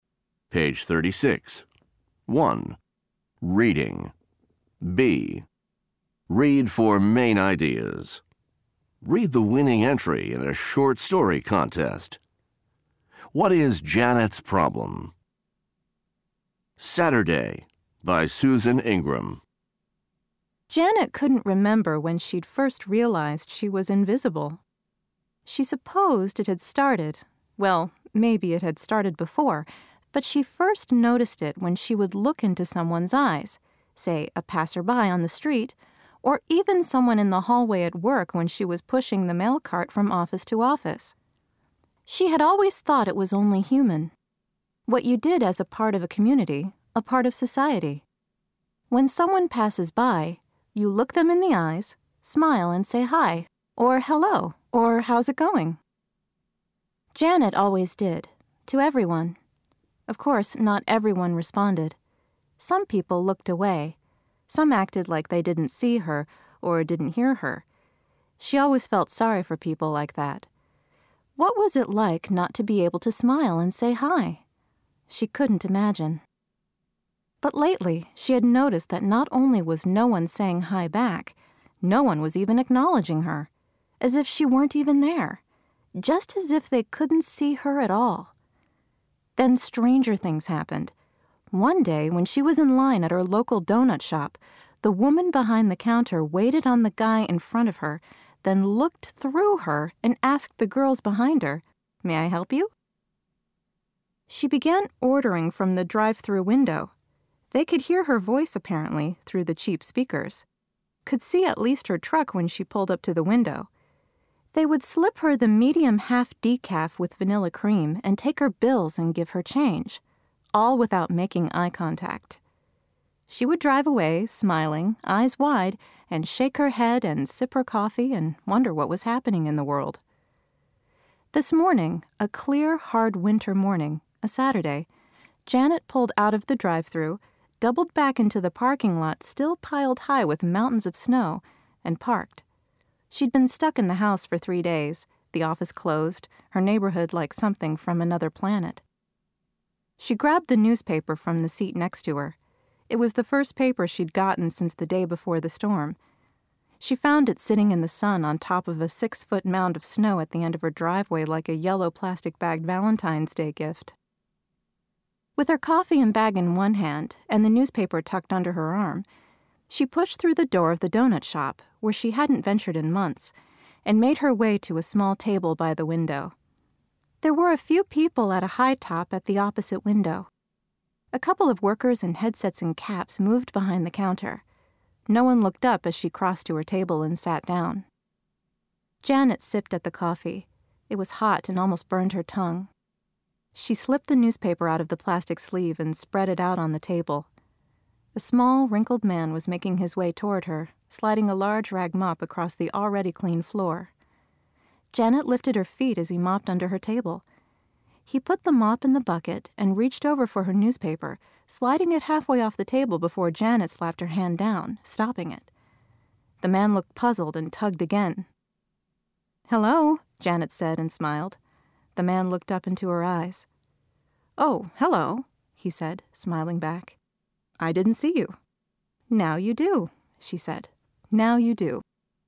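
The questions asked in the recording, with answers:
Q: What is Janet's problem?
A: People don't notice or acknowledge her; she feels invisible.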